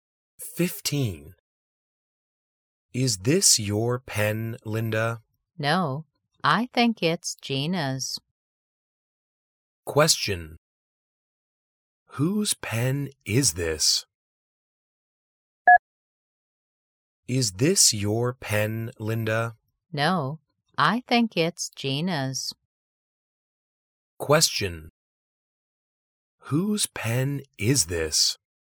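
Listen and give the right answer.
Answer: Gina's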